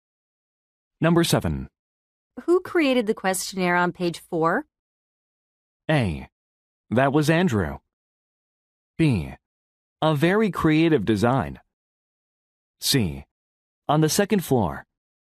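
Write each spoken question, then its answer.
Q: Who created the questionnaire on page 4?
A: A: That was Andrew.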